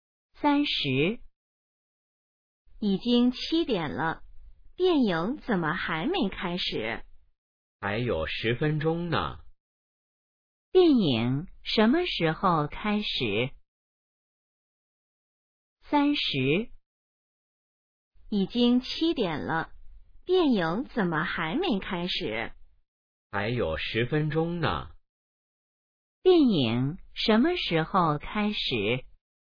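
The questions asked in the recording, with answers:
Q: 电影什么时候开始?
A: 7点10分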